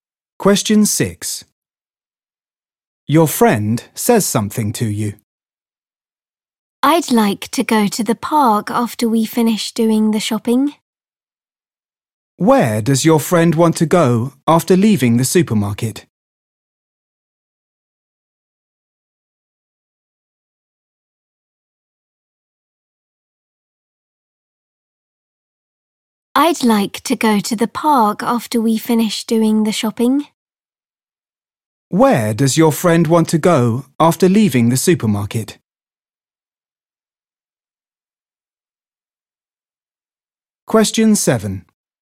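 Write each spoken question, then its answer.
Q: Where does your friend want to go after leaving the supermarket?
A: the park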